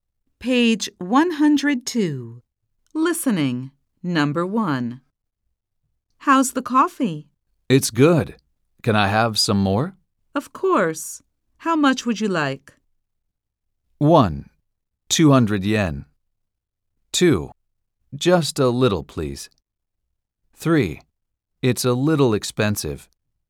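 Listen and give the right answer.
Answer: 2: Just a little, please.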